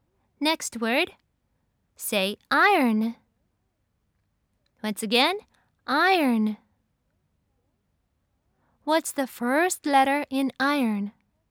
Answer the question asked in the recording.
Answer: That's right. It's I.